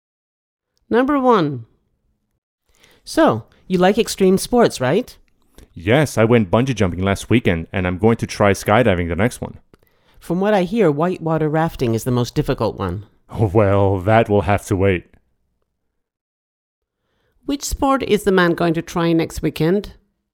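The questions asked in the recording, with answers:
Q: Which sport is the man going to try next weekend?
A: Skydiving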